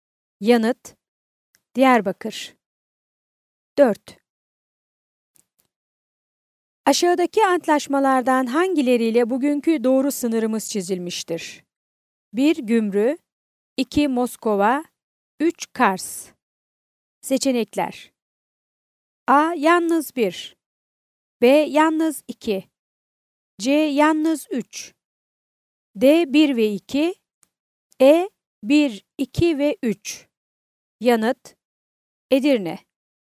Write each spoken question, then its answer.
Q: Aşağıdaki antlaşmalardan hangileriyle bugünkü doğru sınırımız çizilmiştir?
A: Yanıt: Edirne.